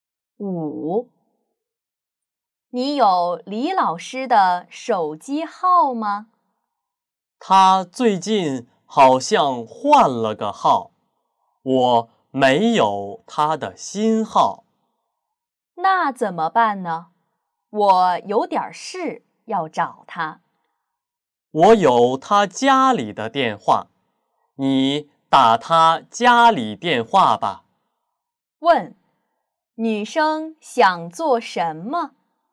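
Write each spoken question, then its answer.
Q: 女生想做什么?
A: 联系李老师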